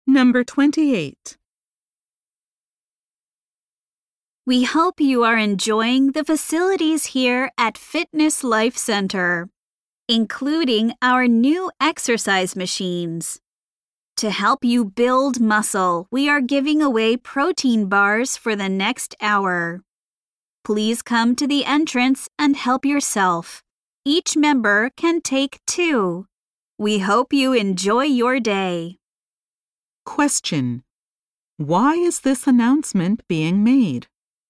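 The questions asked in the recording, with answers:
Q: Why is this announcement being made?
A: To tell members they can get free protein bars at the entrance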